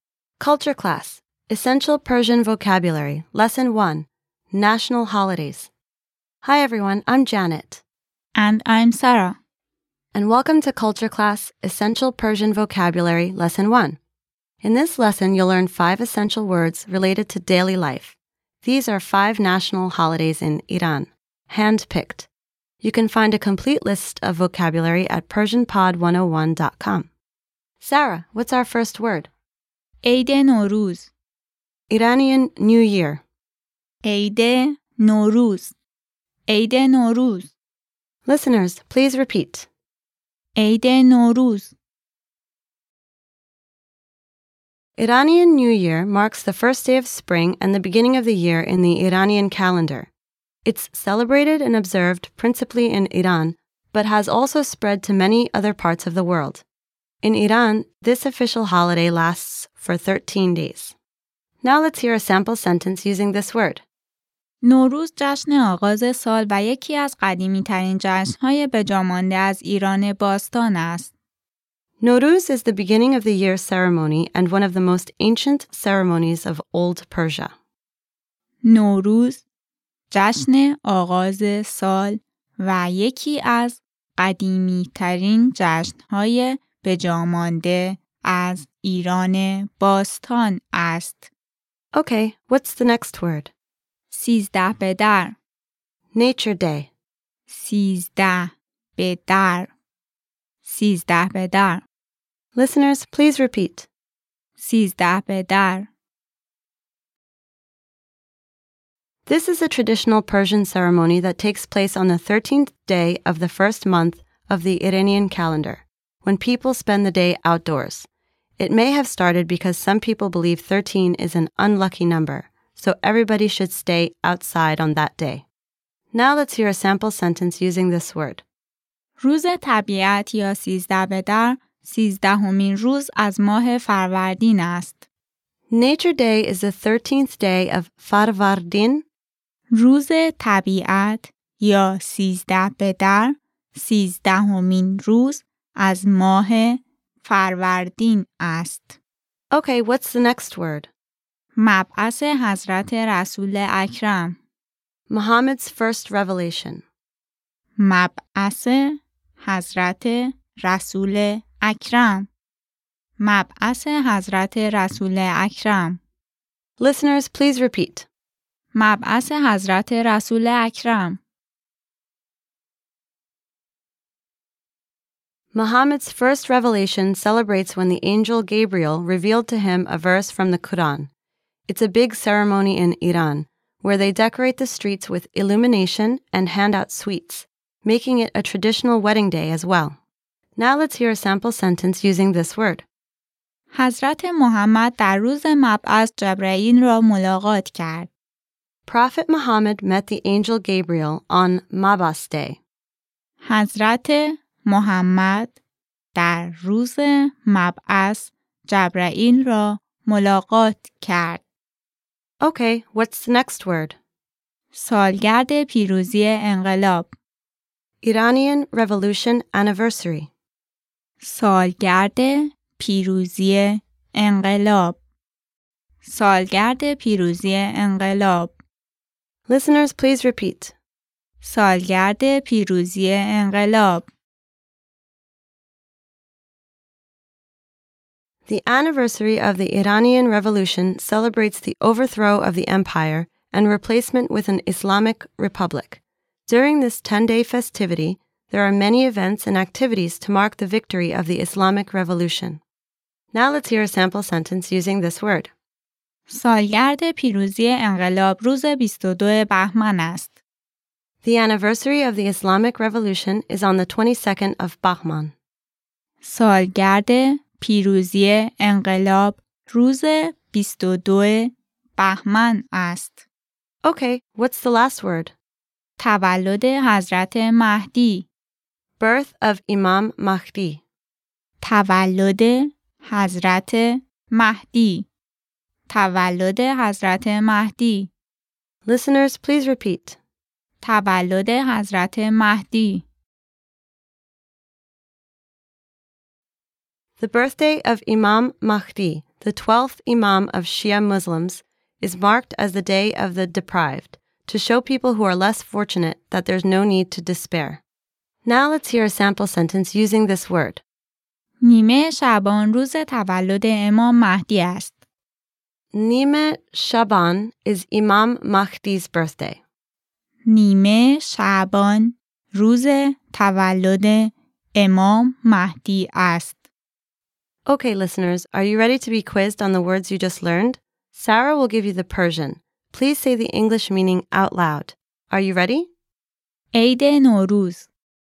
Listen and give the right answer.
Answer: Iranian New Year.